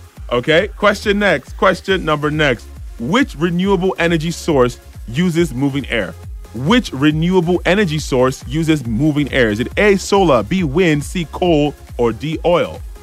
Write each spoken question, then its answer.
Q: Which renewable energy source uses moving air?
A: The answer was wind.